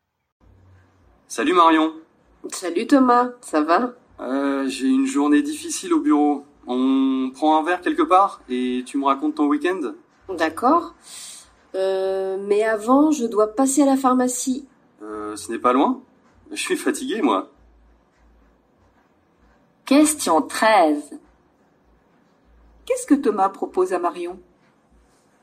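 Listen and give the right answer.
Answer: De prendre un verre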